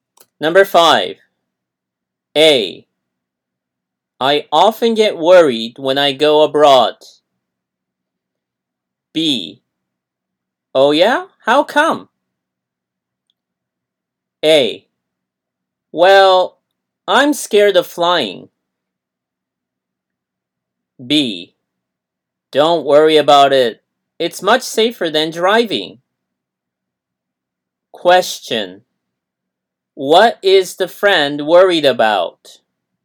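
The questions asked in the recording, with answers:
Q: What is the friend worried about?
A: Flying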